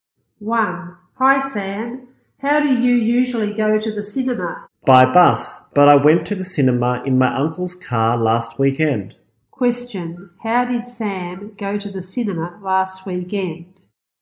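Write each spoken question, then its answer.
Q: Question, how did Sam go to the cinema last weekend?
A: By his uncle's car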